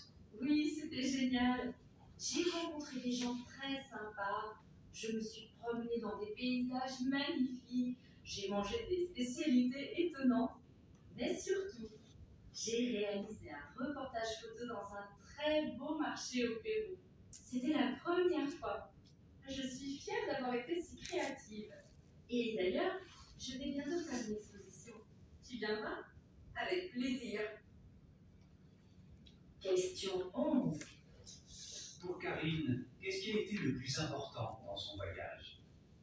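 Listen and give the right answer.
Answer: Avoir réalisé un reportage photo dans un marché au Pérou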